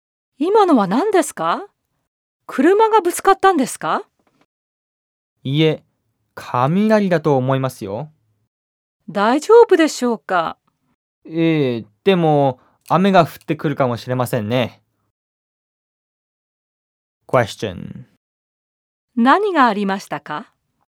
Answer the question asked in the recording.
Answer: 雷が落ちたらしいです。